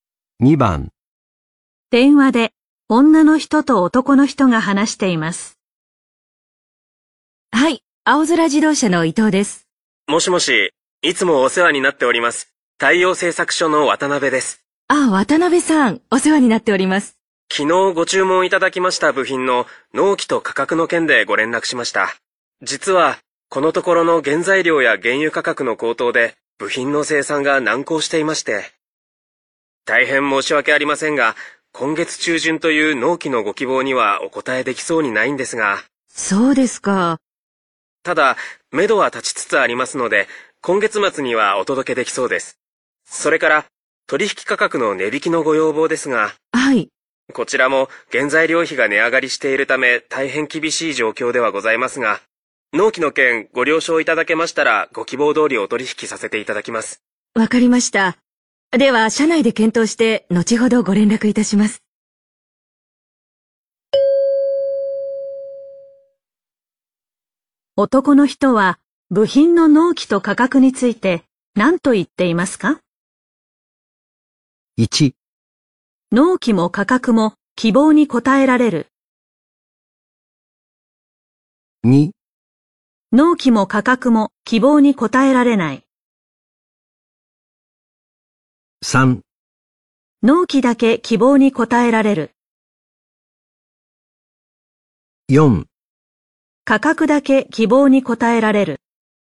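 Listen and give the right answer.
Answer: 4: 価格だけ希望に応えられる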